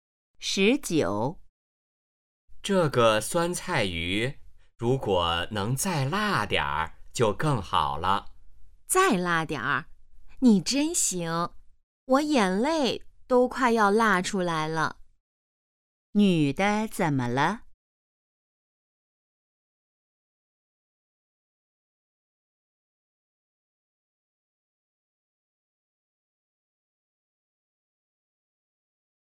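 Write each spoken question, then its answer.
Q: 女的怎么了?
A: 辣得快流眼泪了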